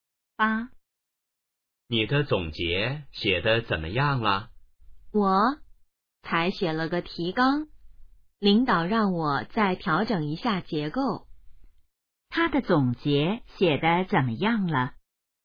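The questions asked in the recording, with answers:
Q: 他的总结写得怎么样了?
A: 只写了提纲,还要调整结构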